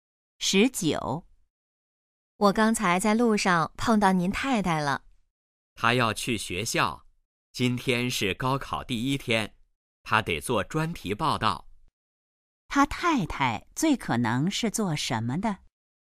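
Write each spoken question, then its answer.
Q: 他太太最可能是做什么的?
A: 记者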